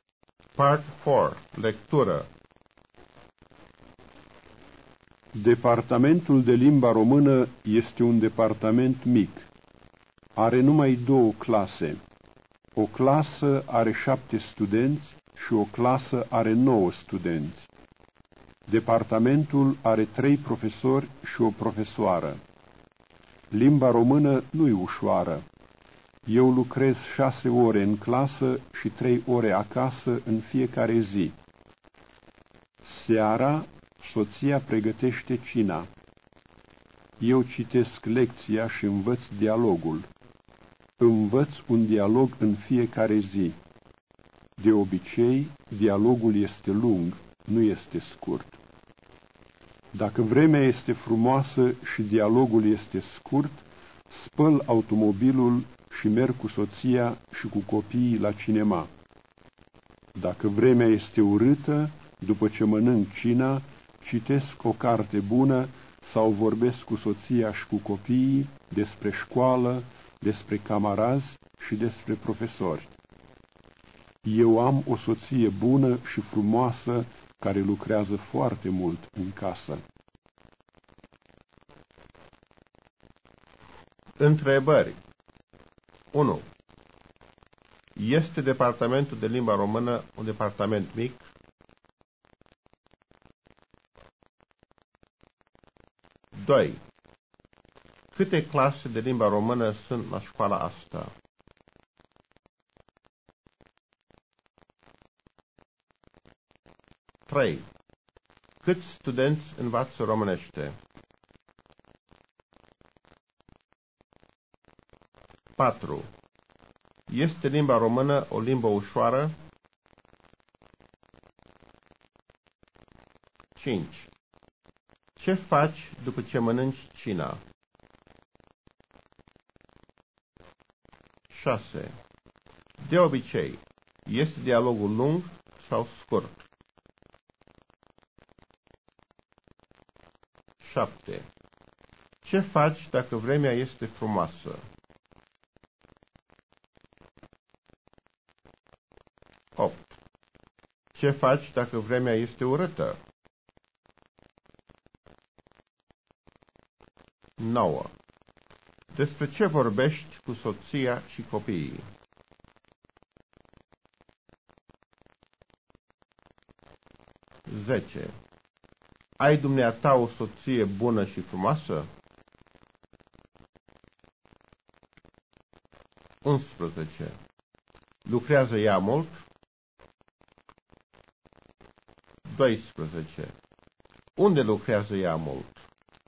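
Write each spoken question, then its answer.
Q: Este departamentul de limba română un departament mic?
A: Da, este un departament mic.

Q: Câte clase de limba română sunt la școala asta?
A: Două clase.

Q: Câți studenți învață românește?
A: 16 studenți (7 și 9).

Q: Este limba română o limbă ușoară?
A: Nu, limba română nu e ușoară.

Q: Ce faci după ce mănânci cina?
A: Dacă vremea este urâtă, citesc o carte bună sau vorbesc cu soția și cu copiii.

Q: De obicei, este dialogul lung sau scurt?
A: Dialogul este lung.

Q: Ce faci dacă vremea este frumoasă?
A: Spăl automobilul și merg cu soția și cu copiii la cinema (dacă dialogul este scurt).

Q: Ce faci dacă vremea este urâtă?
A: După cină, citesc o carte bună sau vorbesc cu soția și cu copiii.

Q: Despre ce vorbești cu soția și copiii?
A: Despre școală, despre camarazi și despre profesori.

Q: Ai dumneata o soție bună și frumoasă?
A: Da, am o soție bună și frumoasă.

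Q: Lucrează ea mult?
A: Da, ea lucrează foarte mult.

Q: Unde lucrează ea mult?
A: În casă.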